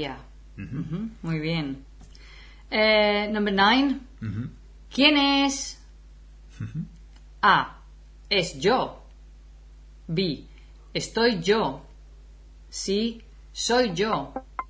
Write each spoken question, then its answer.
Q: ¿Quién es?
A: The answer is soy yo.